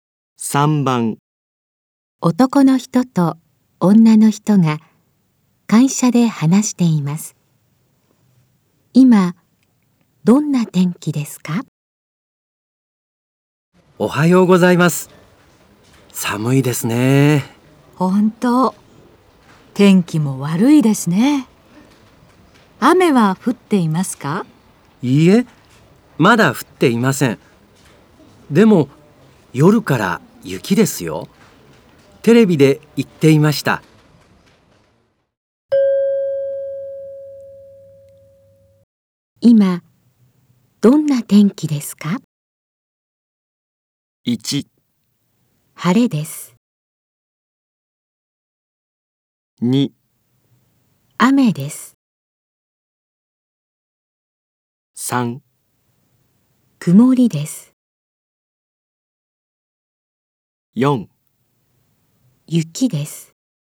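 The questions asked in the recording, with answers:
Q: 今どんな天気ですか?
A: 3: 曇りです。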